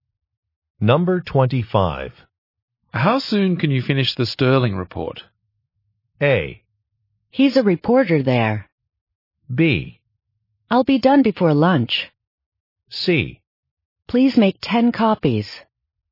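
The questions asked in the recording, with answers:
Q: How soon can you finish the Sterling report?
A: B: I'll be done before lunch.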